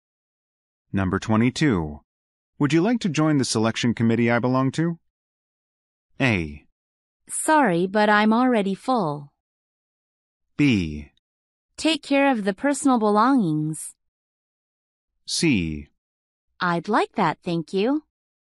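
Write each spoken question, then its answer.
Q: Would you like to join the selection committee I belong to?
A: C: I'd like that, thank you.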